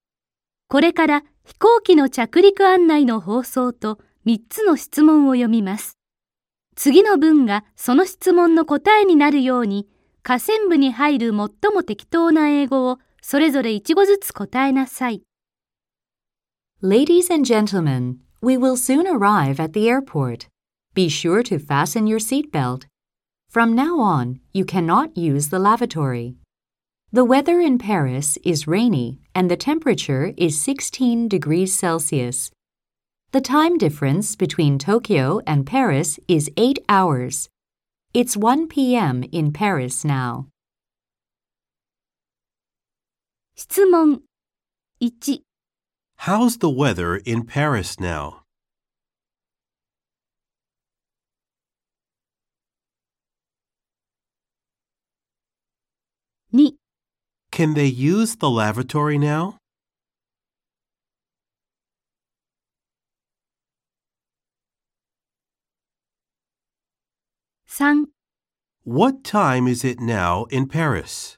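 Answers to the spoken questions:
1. It is rainy.
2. No, they can't.
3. It's 1 p.m.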